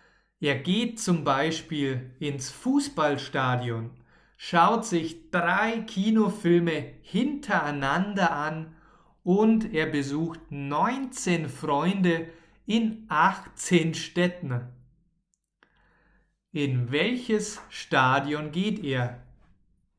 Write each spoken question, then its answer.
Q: In welches Stadion geht er?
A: Ins Fußballstadion. Er geht ins Fußballstadion.